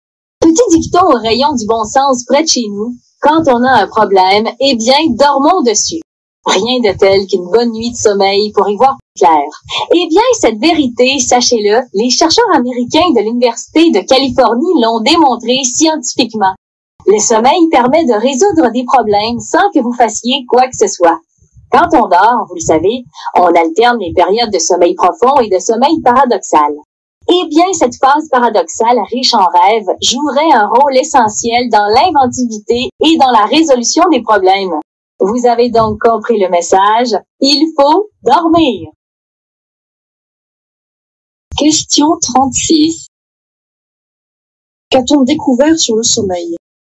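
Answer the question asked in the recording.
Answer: Le sommeil, surtout la phase paradoxale, aide à résoudre les problèmes.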